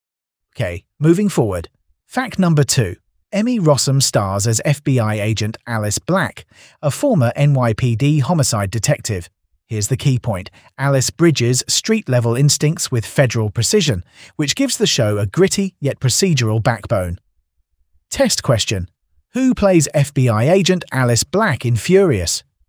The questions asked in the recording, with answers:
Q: Who plays FBI agent Alice Black in Furious?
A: Emmy Rossum.